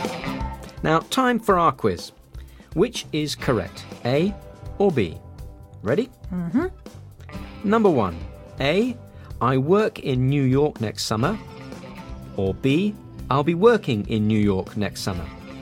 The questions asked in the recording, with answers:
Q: Number one, A, I work in New York next summer. Or B, I'll be working in New York next summer.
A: It's B.